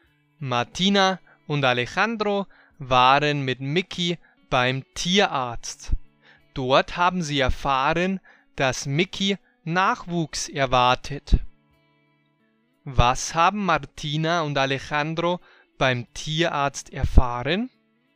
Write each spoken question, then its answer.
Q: Was haben Martina und Alejandro beim Tierarzt erfahren?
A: Sie haben dort erfahren, dass Mickey Nachwuchs erwartet.